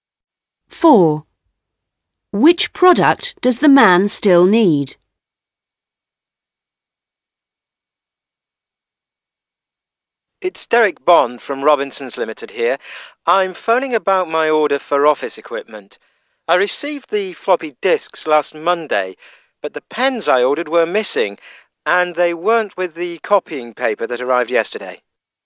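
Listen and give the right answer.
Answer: pens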